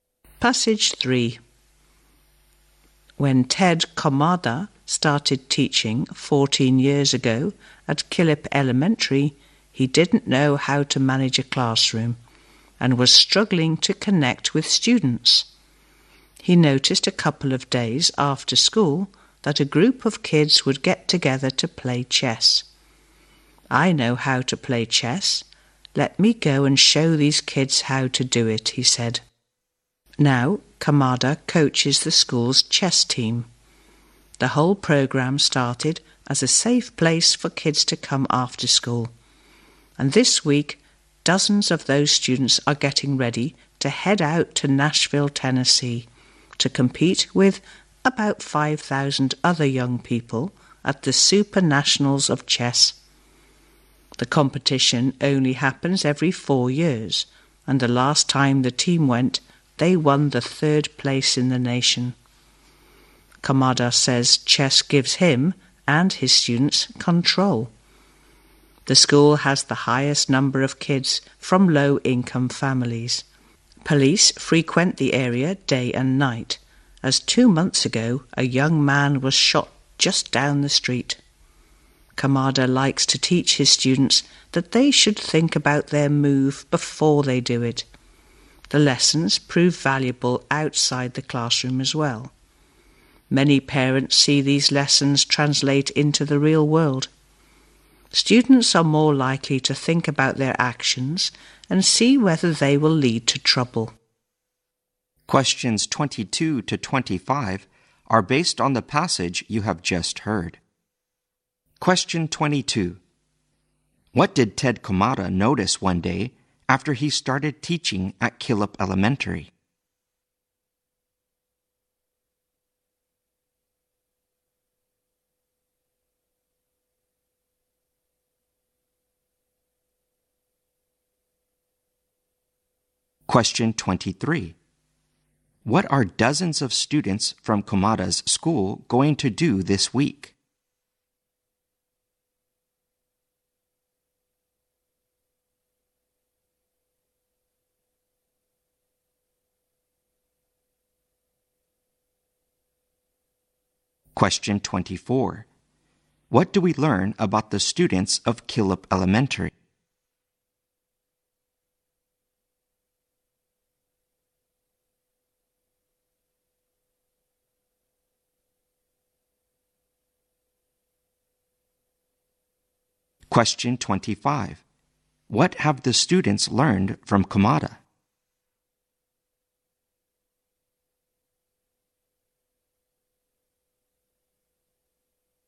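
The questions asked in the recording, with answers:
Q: What did Ted Komada notice one day after he started teaching at Killip Elementary?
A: A group of kids got together after school to play chess.

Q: What are dozens of students from Komada's school going to do this week?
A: Compete in the Super Nationals of Chess in Nashville.

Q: What do we learn about the students of Killip Elementary?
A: Many of them come from low-income families.

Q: What have the students learned from Komada?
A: To think about their moves and actions before making them.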